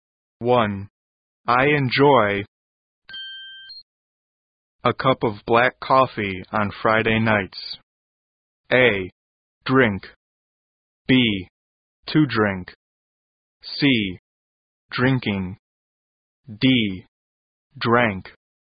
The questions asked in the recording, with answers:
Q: I enjoy a cup of black coffee on Friday nights.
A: 正确的答案就是 C。